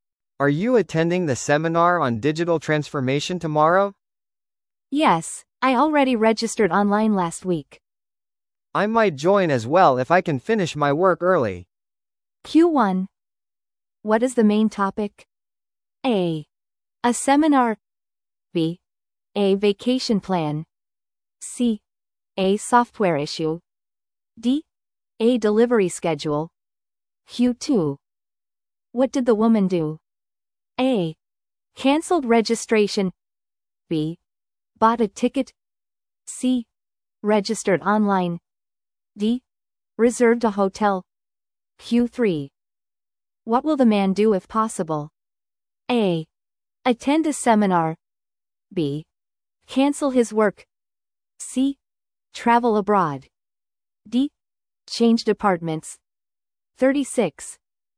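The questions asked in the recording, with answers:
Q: What is the main topic?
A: A: A seminar.

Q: What did the woman do?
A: C: Registered online.

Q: What will the man do if possible?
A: A: Attend a seminar.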